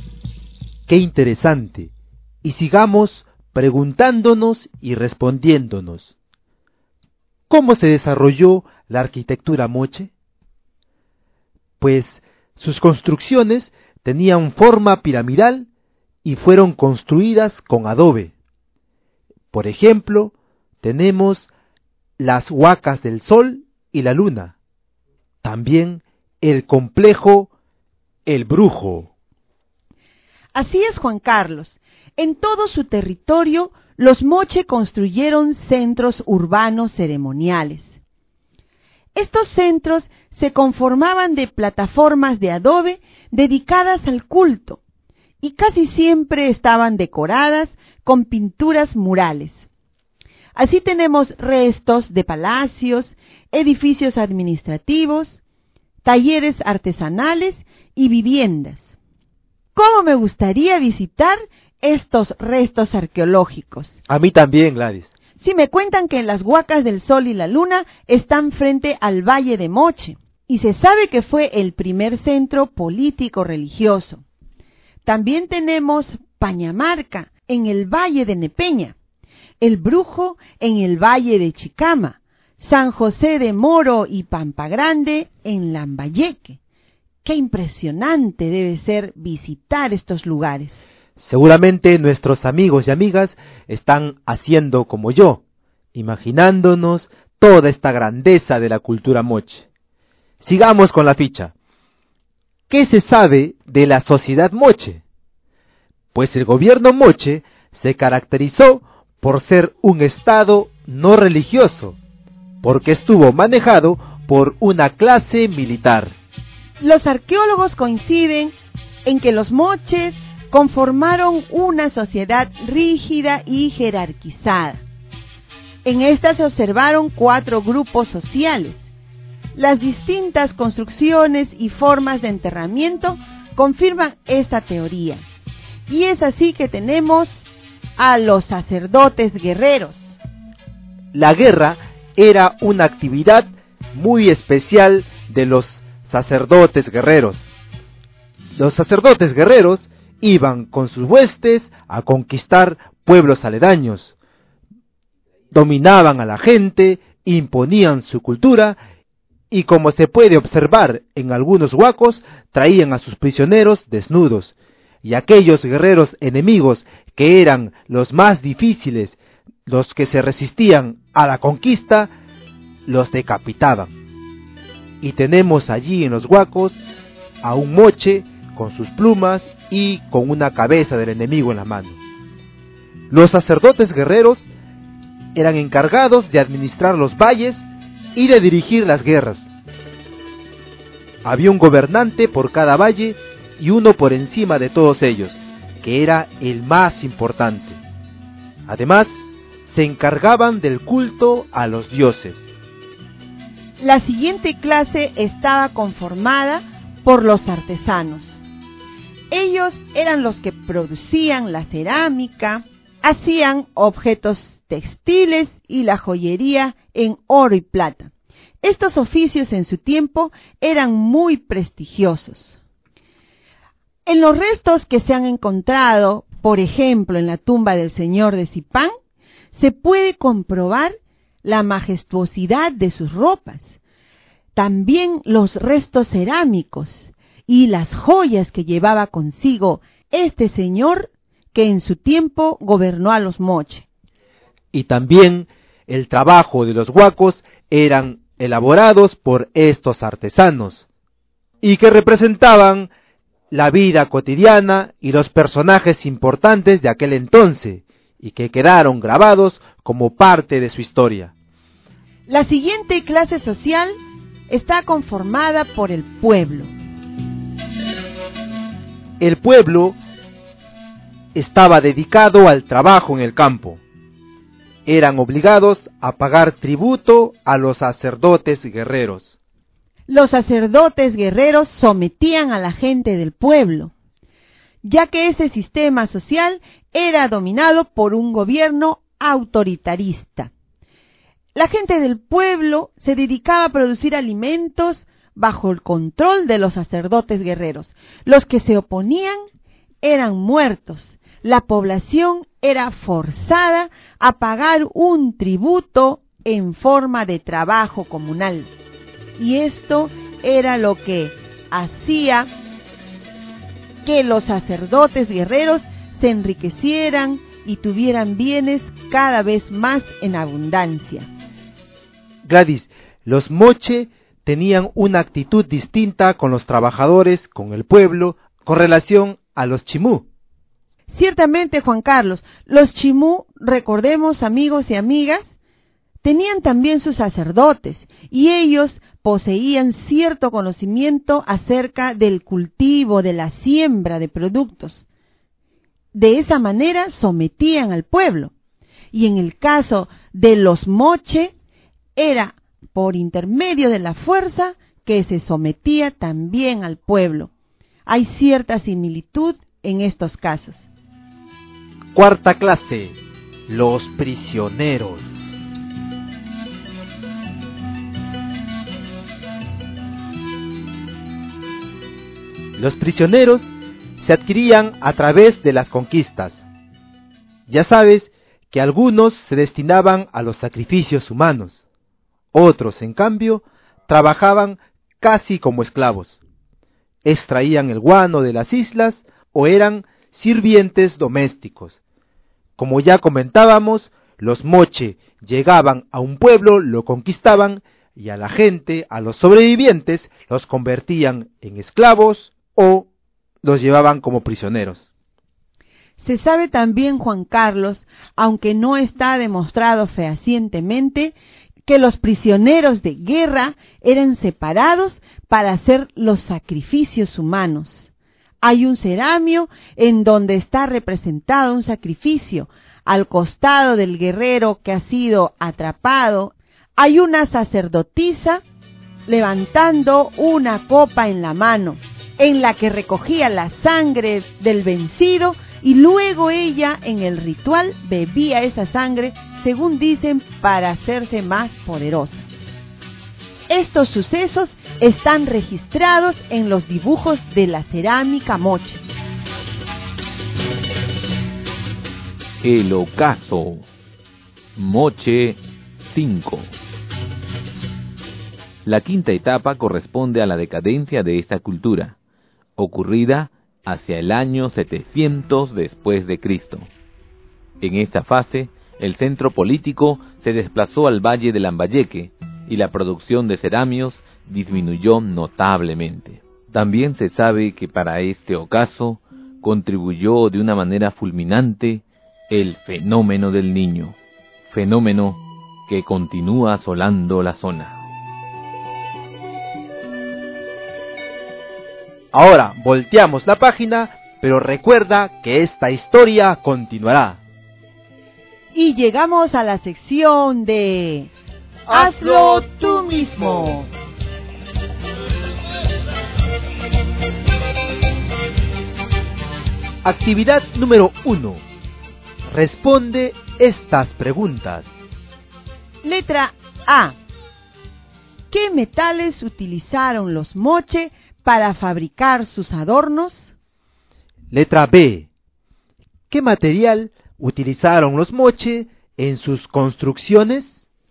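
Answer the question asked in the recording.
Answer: Adobe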